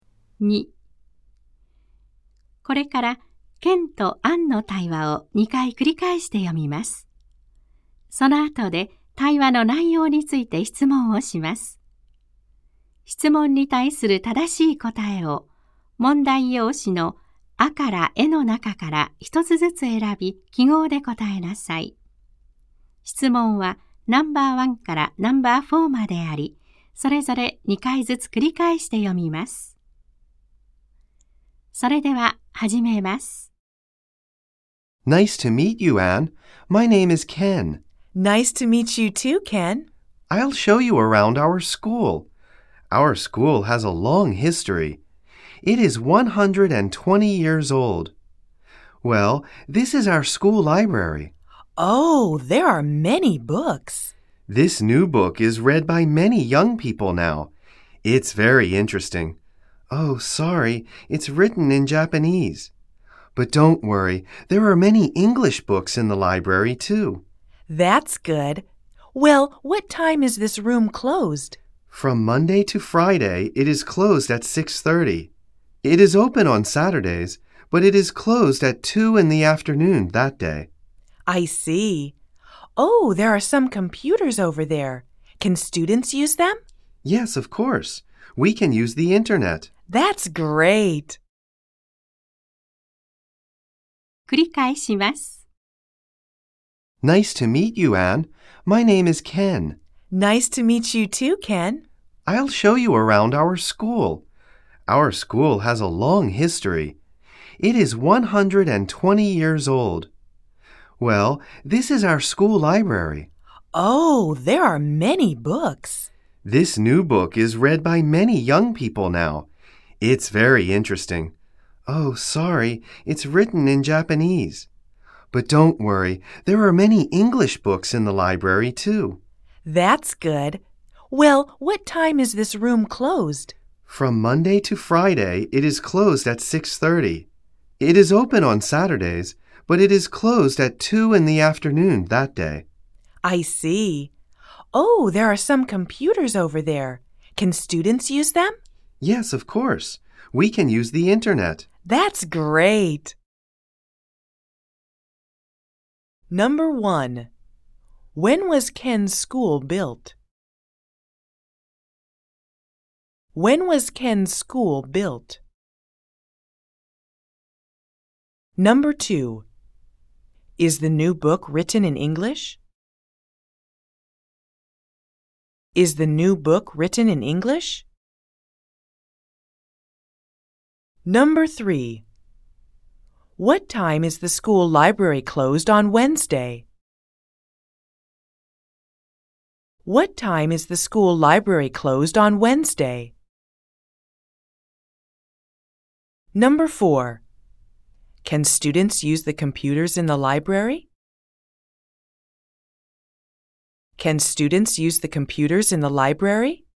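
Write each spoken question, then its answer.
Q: When was Ken's school built?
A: 120 years ago

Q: Is the new book written in English?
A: No, it isn't. It's written in Japanese.

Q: What time is the school library closed on Wednesday?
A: At 6:30

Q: Can students use the computers in the library?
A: Yes, they can.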